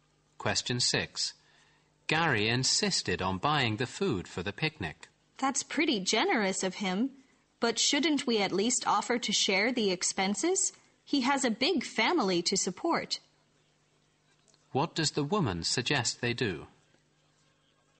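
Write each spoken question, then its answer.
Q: What does the woman suggest they do?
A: Offer to share the cost of the picnic food with Gary.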